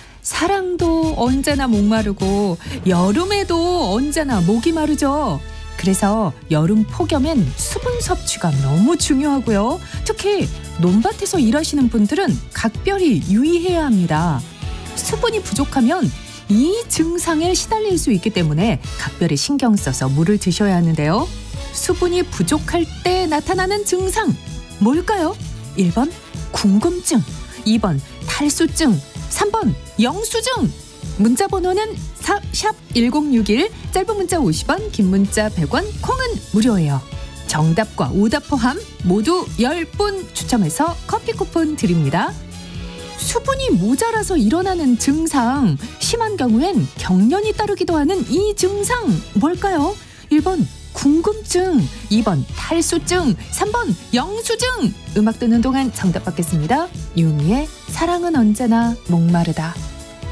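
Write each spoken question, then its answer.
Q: 수분이 부족할 때 나타나는 증상 뭘까요?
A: 2번: 탈수증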